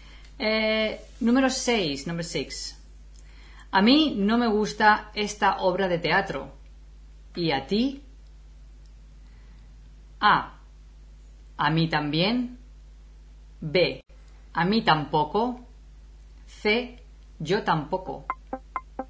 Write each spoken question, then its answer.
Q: A mí no me gusta esta obra de teatro.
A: Say B. A mí tampoco.